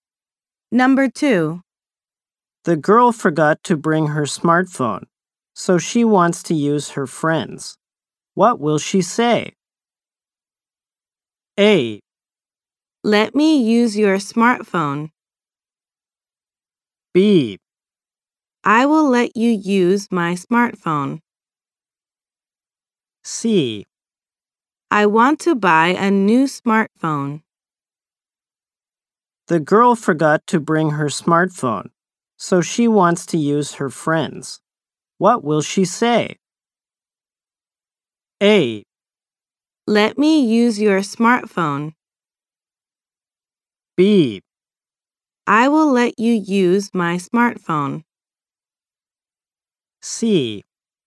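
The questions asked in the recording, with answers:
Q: What will she say?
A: A: Let me use your smartphone.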